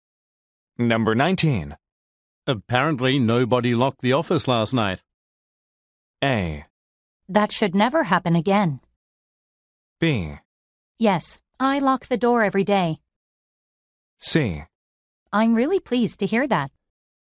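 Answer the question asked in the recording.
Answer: A: That should never happen again.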